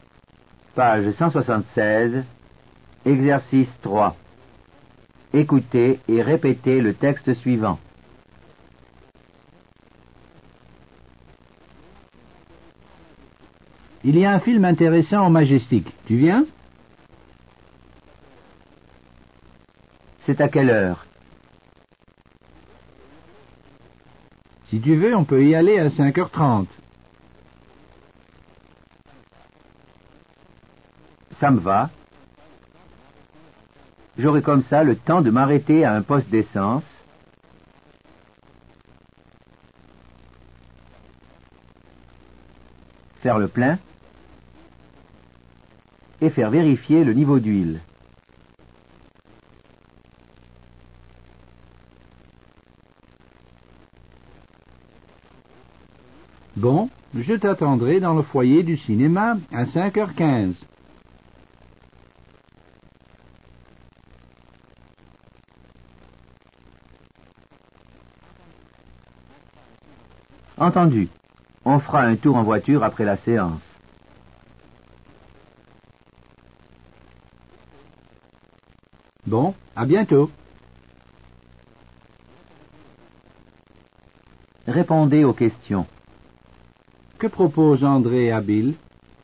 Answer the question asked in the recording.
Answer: Il lui propose d'aller au cinéma.